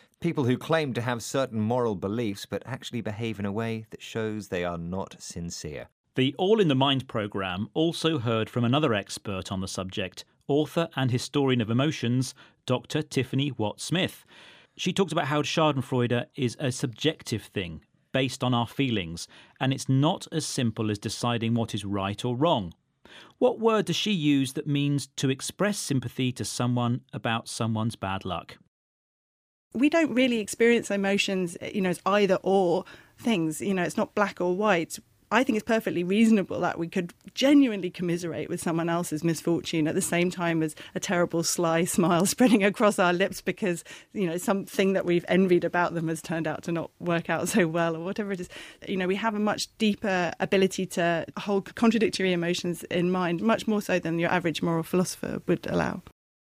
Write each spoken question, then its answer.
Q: What word does she use that means to express sympathy to someone about someone's bad luck?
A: She says when something goes wrong for someone, we have the ability to commiserate with them.